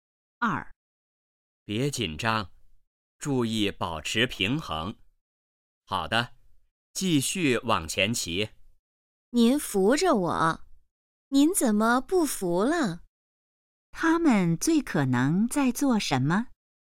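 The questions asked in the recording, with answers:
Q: 他们最可能在做什么?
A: 学骑自行车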